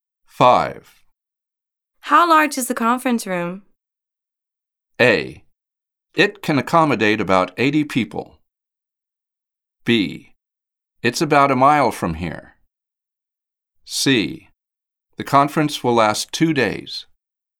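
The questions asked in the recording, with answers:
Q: How large is the conference room?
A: A: It can accommodate about 80 people.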